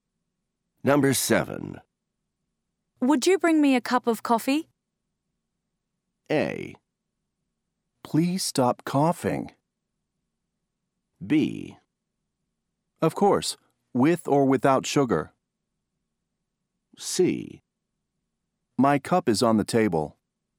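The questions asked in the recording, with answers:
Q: Would you bring me a cup of coffee?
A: B: Of course, with or without sugar.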